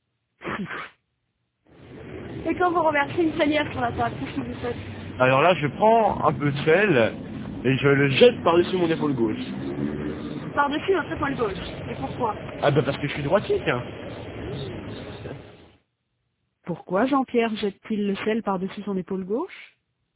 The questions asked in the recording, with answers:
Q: Pourquoi Jean-Pierre jette-t-il le sel par-dessus son épaule gauche?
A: Parce qu'il est droitier.